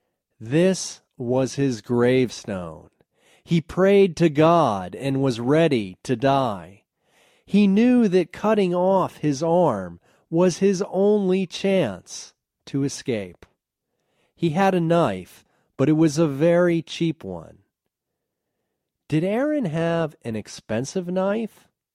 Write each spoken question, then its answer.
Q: Did Aaron have an expensive knife?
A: No, his knife wasn't expensive.